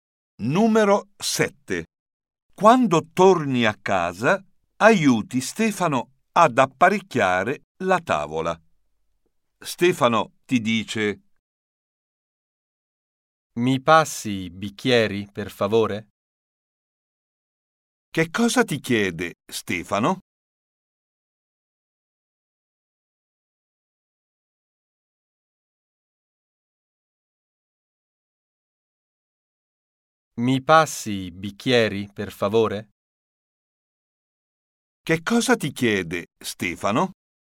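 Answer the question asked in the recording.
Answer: di passargli i bicchieri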